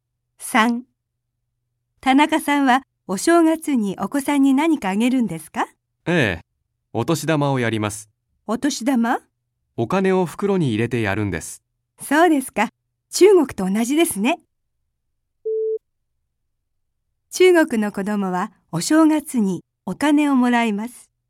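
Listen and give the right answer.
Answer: 正しい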